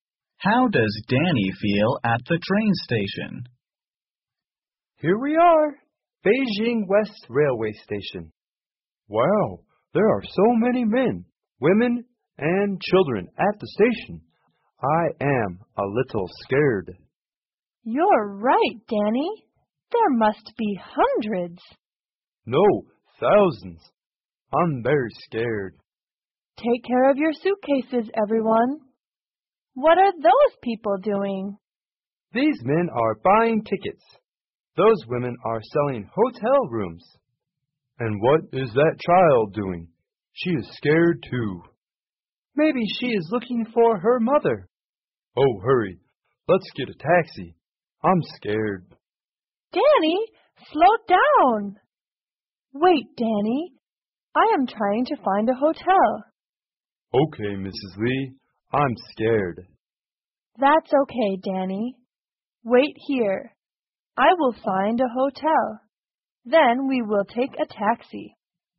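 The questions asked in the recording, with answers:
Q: How does Danny feel at the train station?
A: He feels scared.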